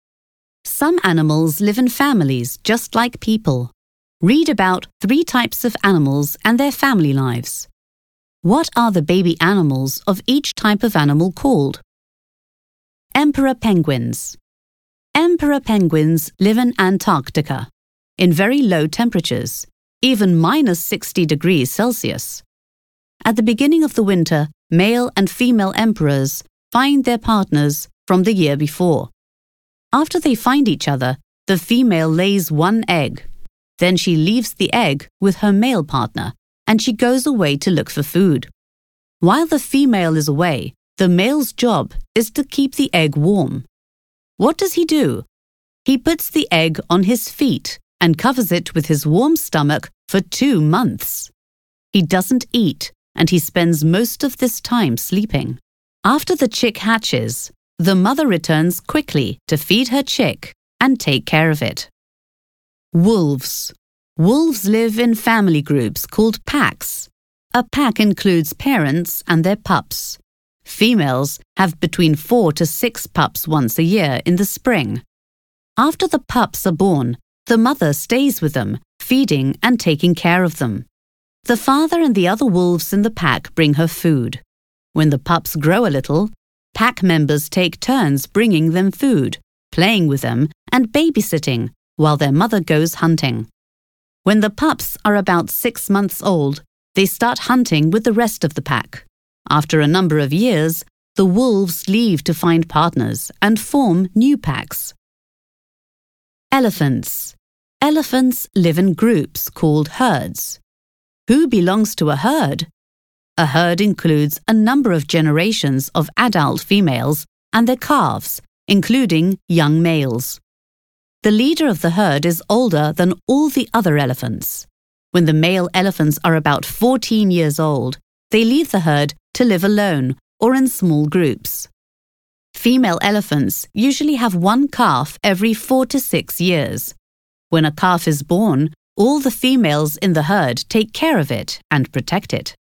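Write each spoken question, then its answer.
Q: What are the baby animals of each type of animal called?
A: Emperor penguins: chicks; wolves: pups; elephants: calves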